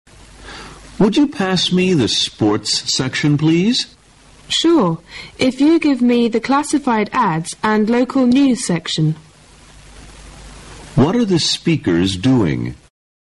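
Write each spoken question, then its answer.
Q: What are the speakers doing?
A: Reading a newspaper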